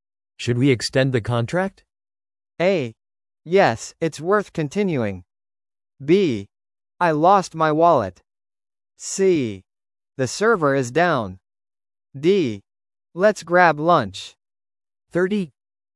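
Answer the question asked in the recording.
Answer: A: Yes, it's worth continuing.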